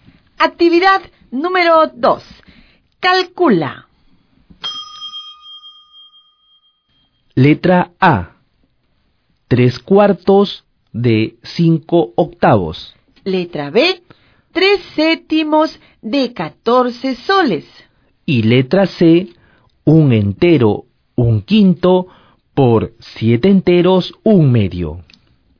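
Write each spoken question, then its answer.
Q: 3/4 de 5/8.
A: 15/32

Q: 3/7 de 14 soles.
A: 6 soles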